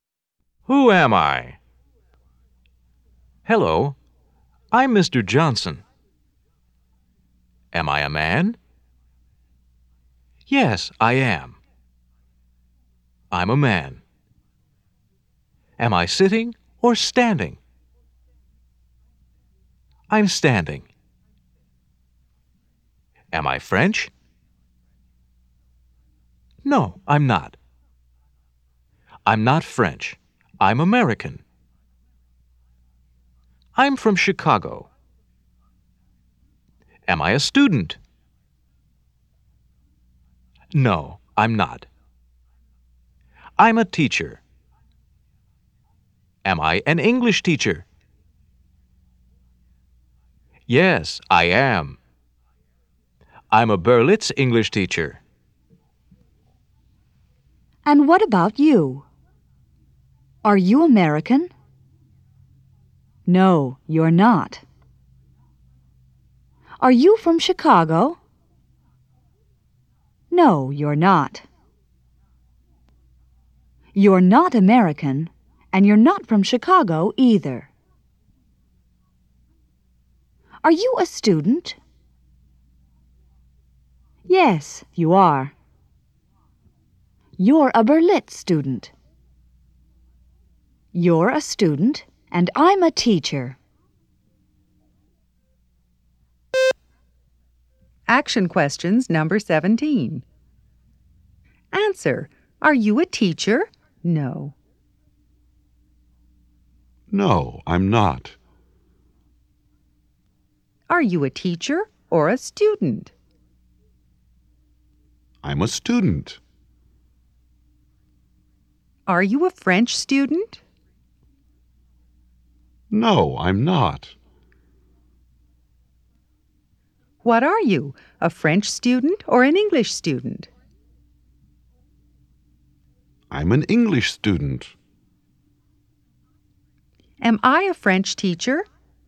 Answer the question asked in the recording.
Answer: No, you're not.